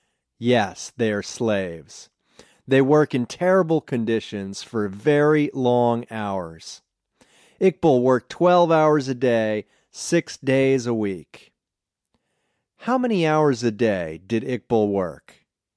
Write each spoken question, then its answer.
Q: How many hours a day did Iqbal work?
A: He worked 12 hours a day.